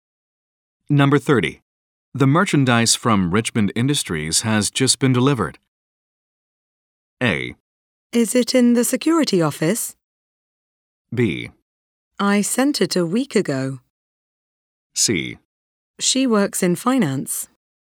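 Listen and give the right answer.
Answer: A: Is it in the security office?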